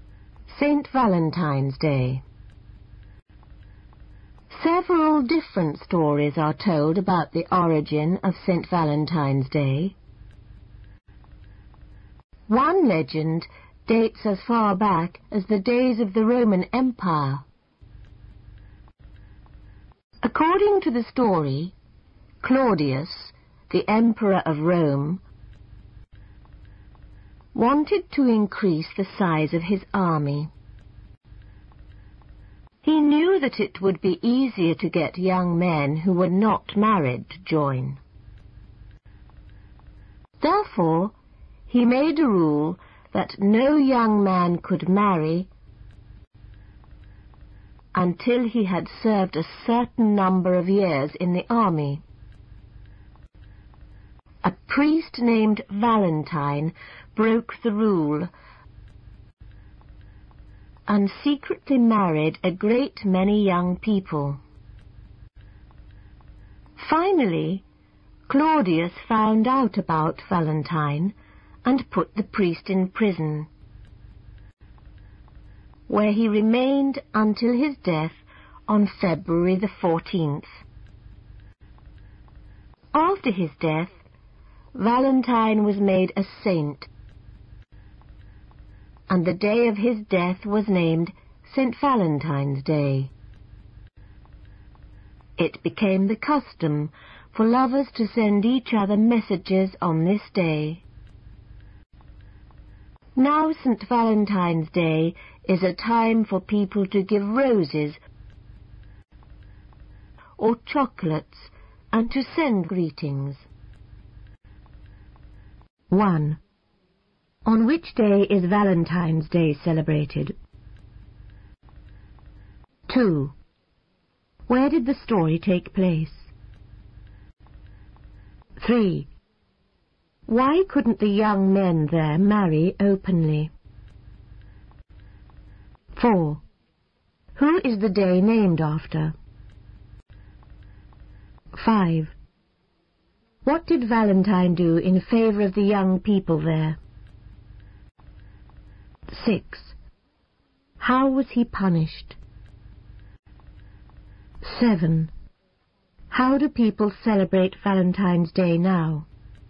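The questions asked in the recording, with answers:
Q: On which day is Valentine's Day celebrated?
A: February 14th

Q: Where did the story take place?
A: In Rome (the Roman Empire)

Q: Why couldn't the young men there marry openly?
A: The Emperor forbade marriage before army service

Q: Who is the day named after?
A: A priest named Valentine

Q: What did Valentine do in favor of the young people there?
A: He secretly married them

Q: How was he punished?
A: He was put in prison until his death

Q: How do people celebrate Valentine's Day now?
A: By giving roses or chocolates and sending greetings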